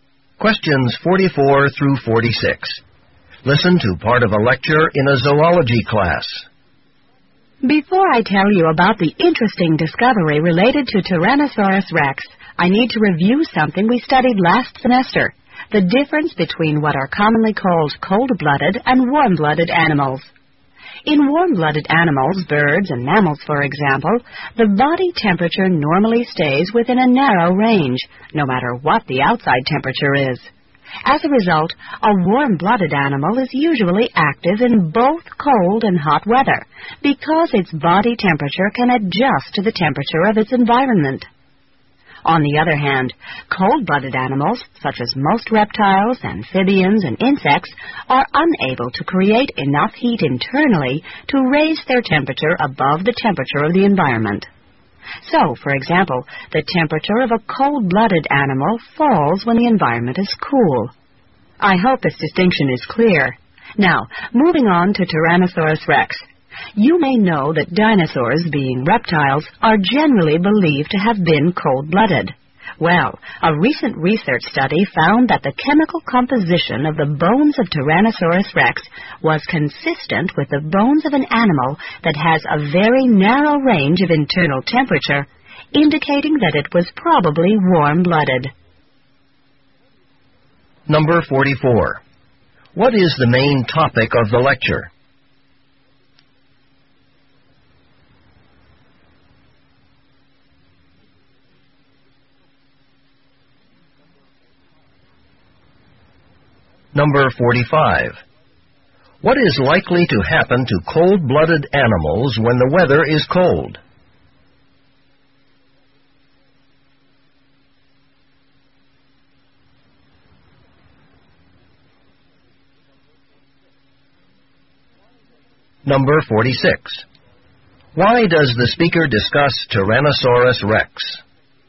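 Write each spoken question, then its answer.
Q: What is likely to happen to cold-blooded animals when the weather is cold?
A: Their body temperature falls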